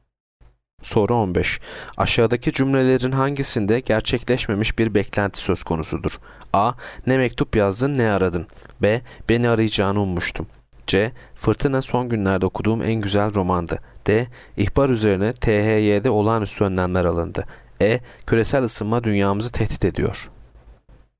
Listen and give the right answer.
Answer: Yanıt B. Beni arayacağını ummuştum.